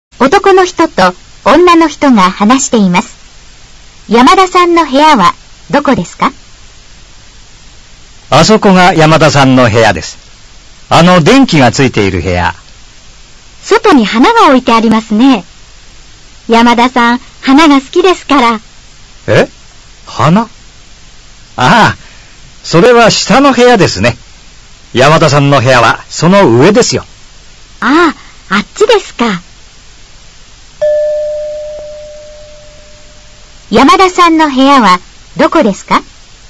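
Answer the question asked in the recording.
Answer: 花が置いてある部屋の上の、電気がついている部屋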